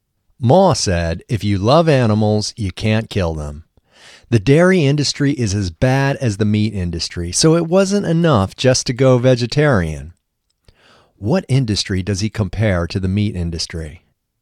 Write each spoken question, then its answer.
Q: What industry does he compare to the meat industry?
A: He compares the dairy industry to the meat industry.